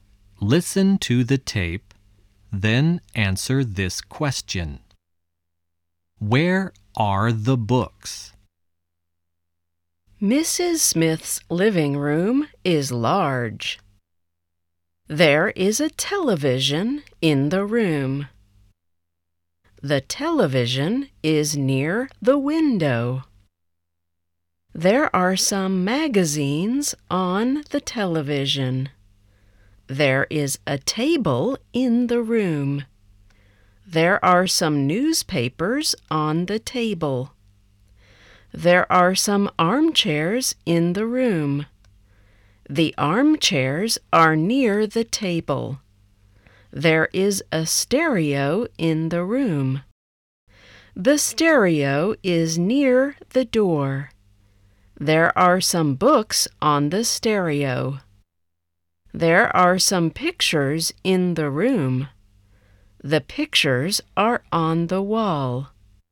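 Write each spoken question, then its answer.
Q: Where are the books?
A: On the stereo.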